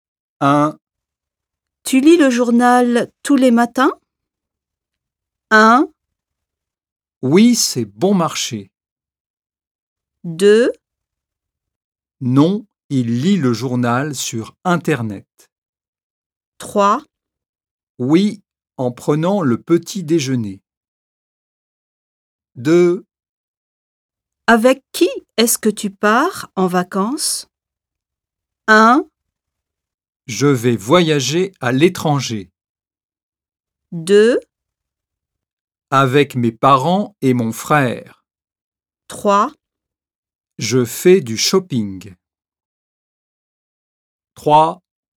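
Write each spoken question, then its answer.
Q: Tu lis le journal tous les matins?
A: 3: Oui, en prenant le petit déjeuner.

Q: Avec qui est-ce que tu pars en vacances?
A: 2: Avec mes parents et mon frère.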